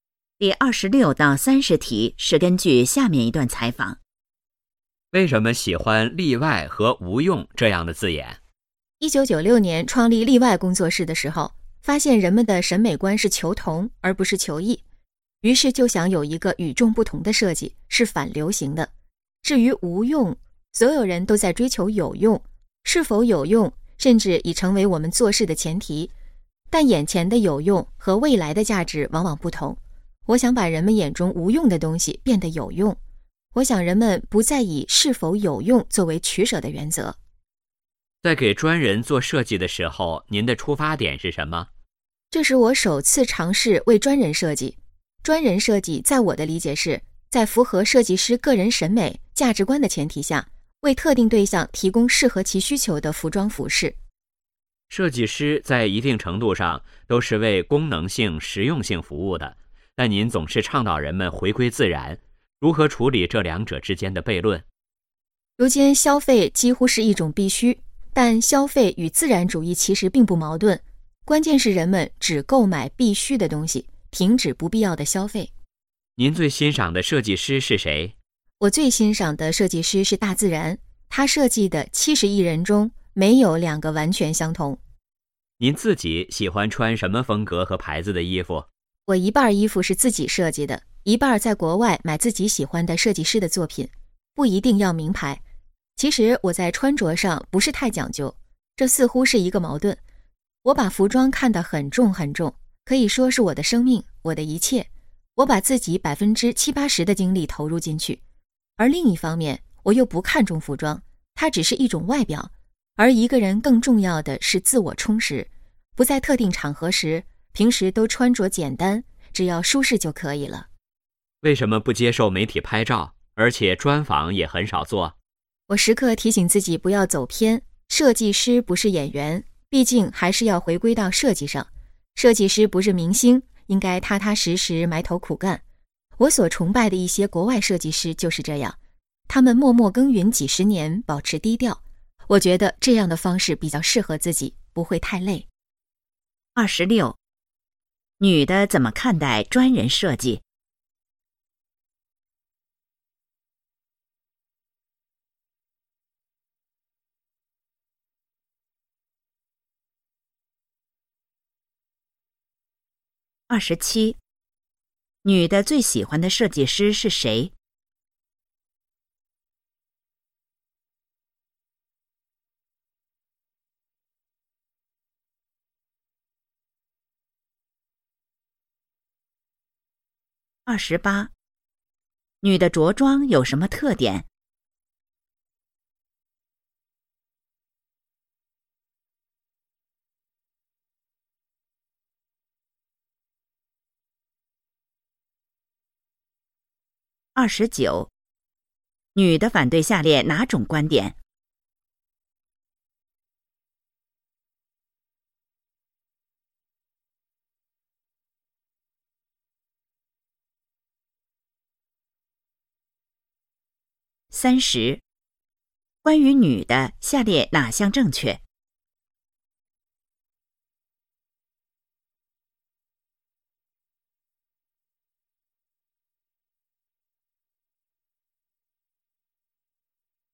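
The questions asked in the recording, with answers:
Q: 女的怎么看待专人设计?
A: 在符合设计师审美的前提下,为特定对象提供适合其需求的服装

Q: 女的最喜欢的设计师是谁?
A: 大自然

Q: 女的着装有什么特点?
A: 平时穿着简单,舒适就行,不一定要名牌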